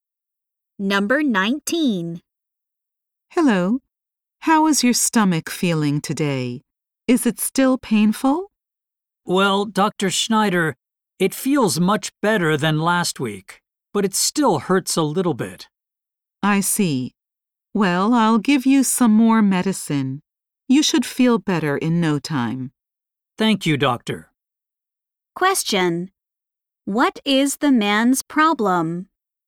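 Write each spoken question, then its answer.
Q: What is the man's problem?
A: His stomach still hurts a little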